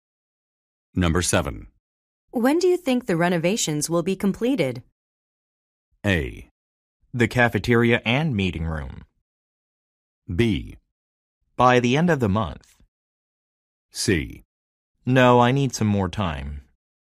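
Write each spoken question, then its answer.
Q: When do you think the renovations will be completed?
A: B: By the end of the month.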